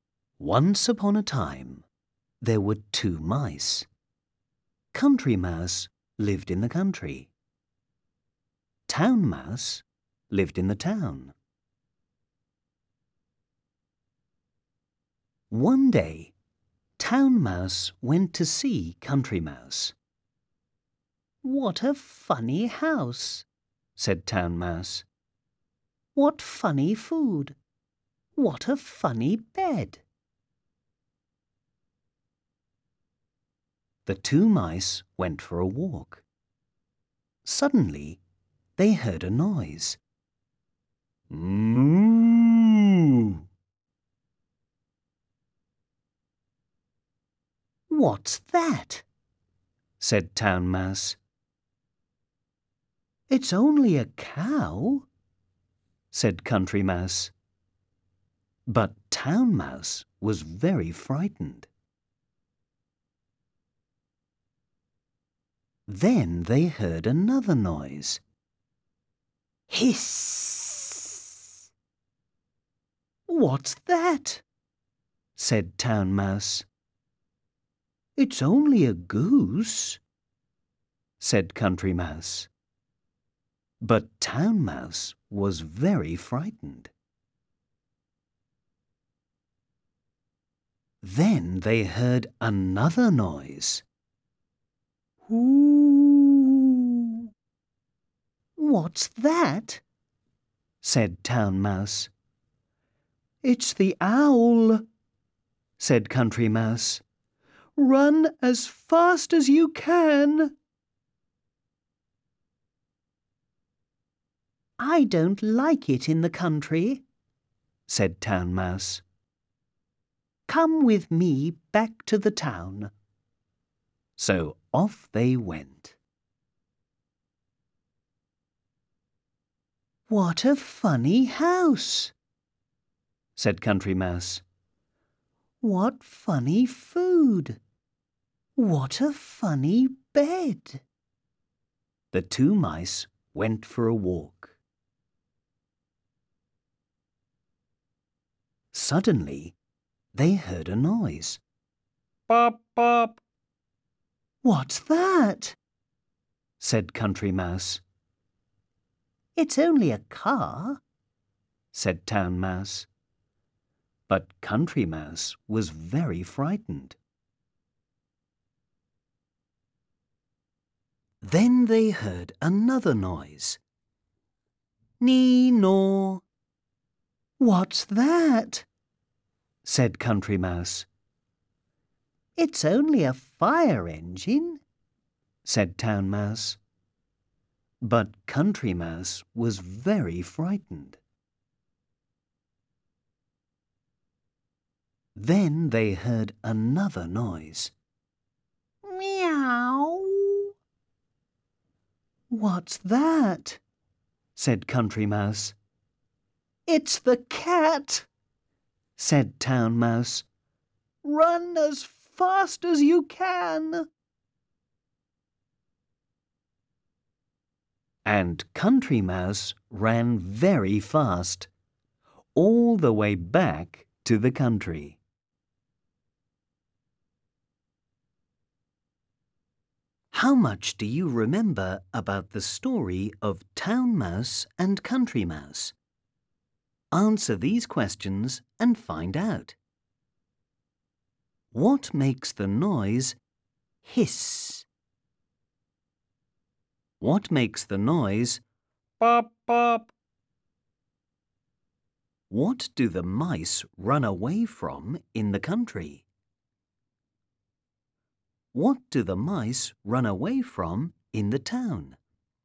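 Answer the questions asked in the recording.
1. a goose
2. a car
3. the owl
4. the cat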